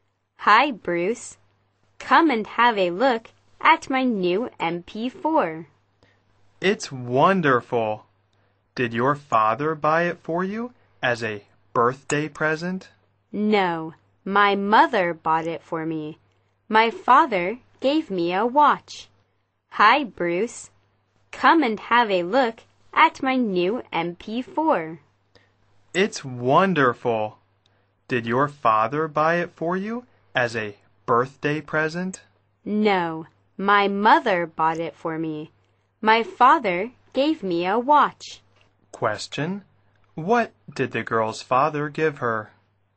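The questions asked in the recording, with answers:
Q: What did the girl's father give her?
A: A watch.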